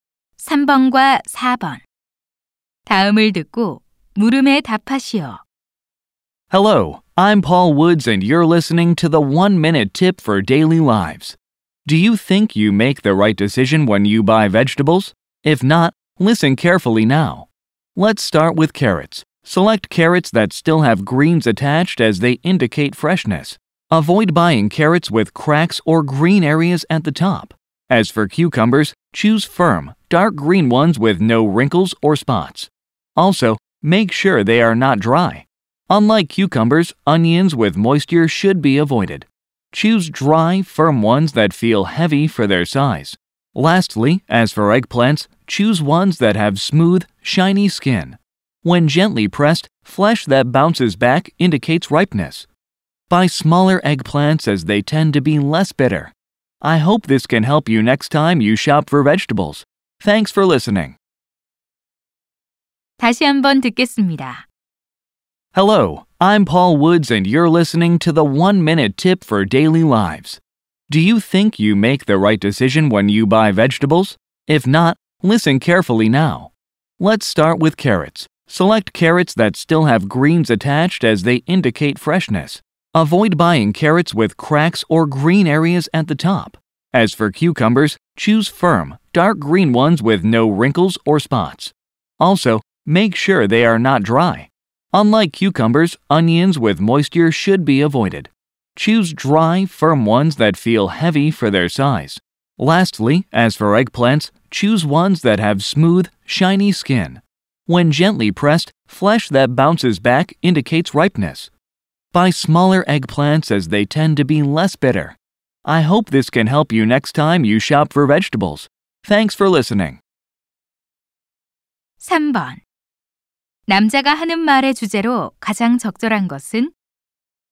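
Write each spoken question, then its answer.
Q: 남자가 하는 말의 주제로 가장 적절한 것은?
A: 좋은 채소를 고르는 방법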